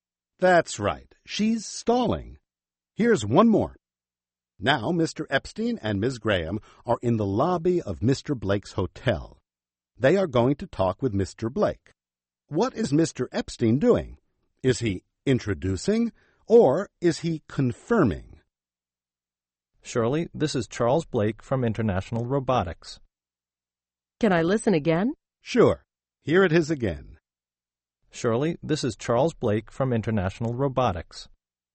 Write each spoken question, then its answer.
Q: What is Mr. Epstein doing? Is he introducing or is he confirming?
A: He's introducing Mr. Blake to Ms.